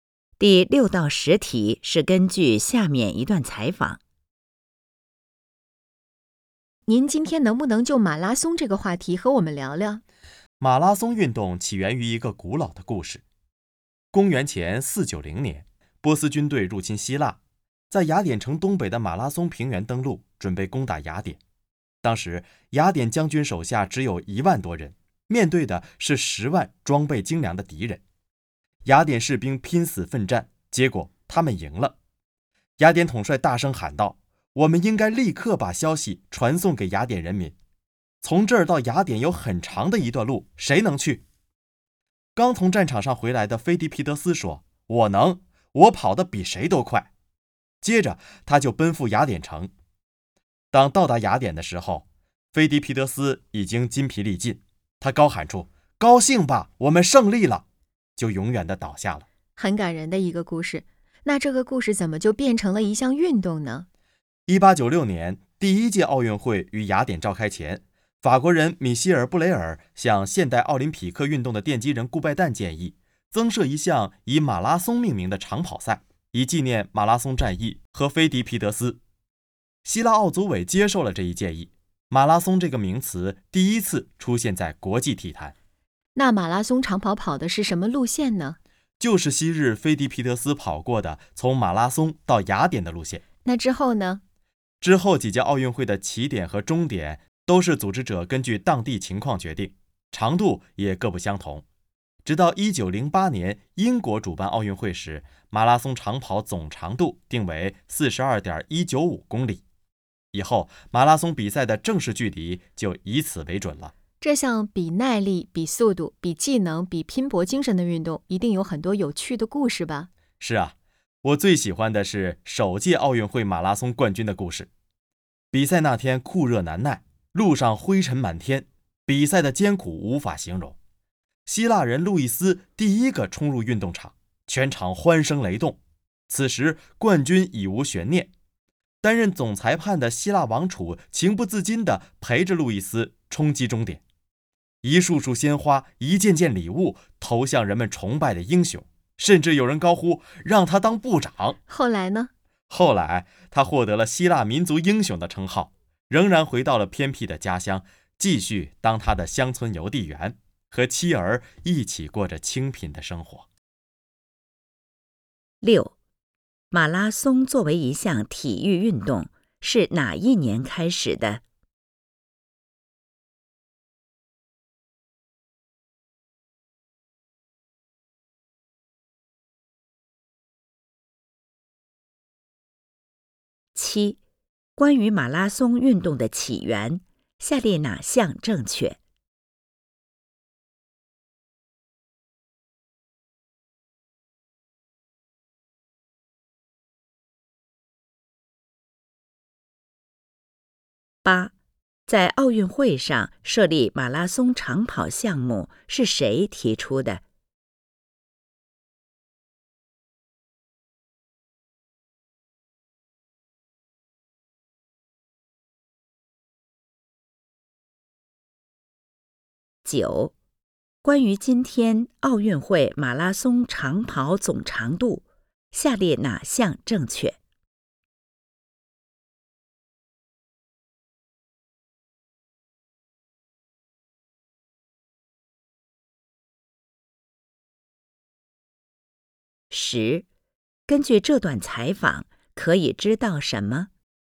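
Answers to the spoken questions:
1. 1896年
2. 法国人米歇尔·布雷尔
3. 42.195公里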